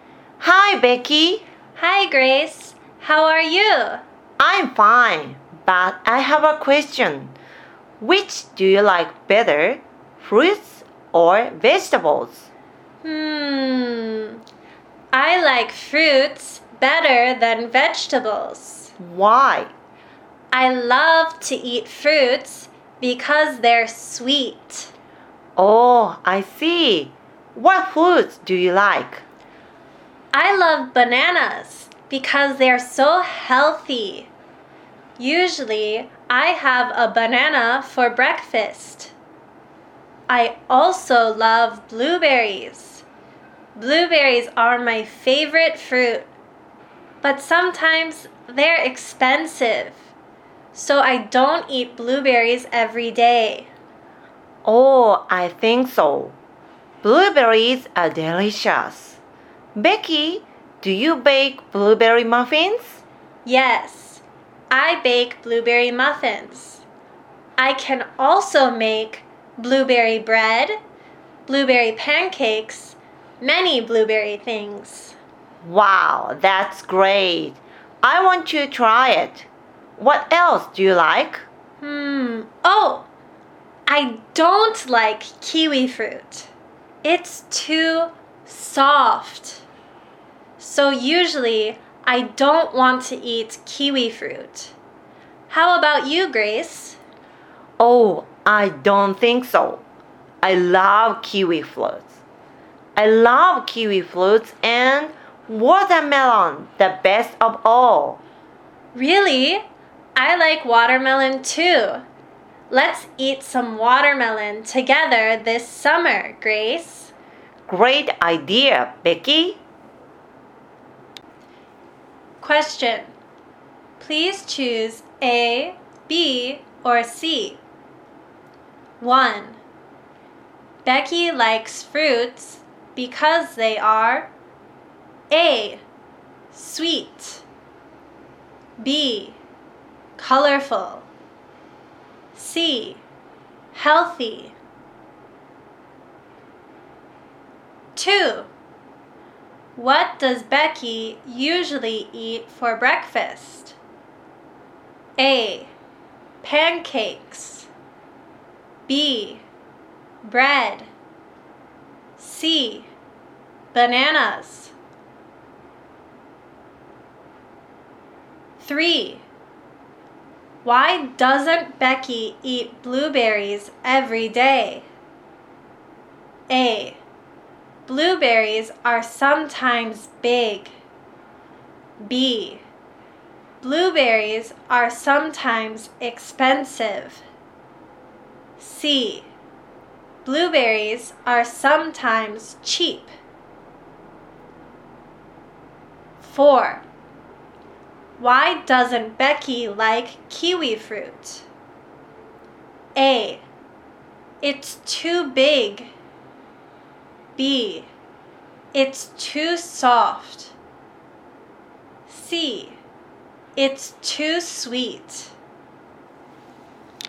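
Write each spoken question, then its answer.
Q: Becky likes fruits because they are A, sweet, B, colorful, C, healthy.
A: A: sweet

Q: What does Becky usually eat for breakfast?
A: C: bananas

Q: Why doesn't Becky eat blueberries every day?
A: B: Blueberries are sometimes expensive.

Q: Why doesn't Becky like kiwi fruit?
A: B: It's too soft.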